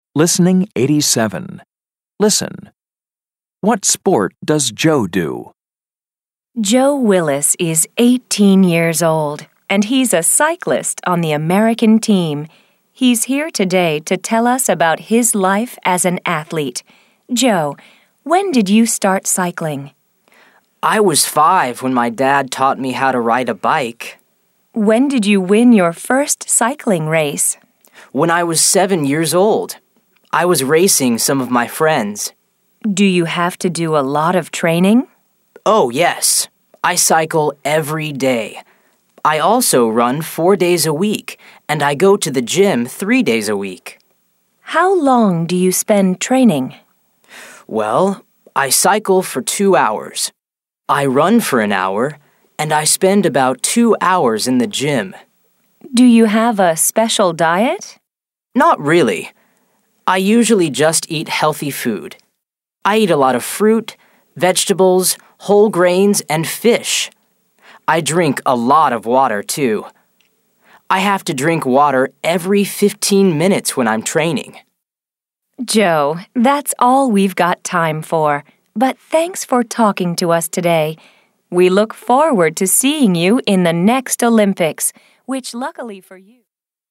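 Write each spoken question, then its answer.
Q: What sport does Joe do?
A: Cycling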